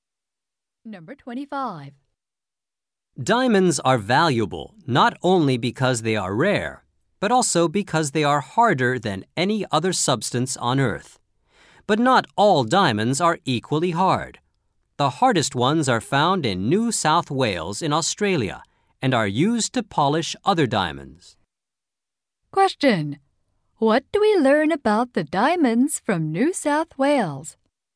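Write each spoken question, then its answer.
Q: What do we learn about the diamonds from New South Wales?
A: They are the hardest and are used to polish other diamonds.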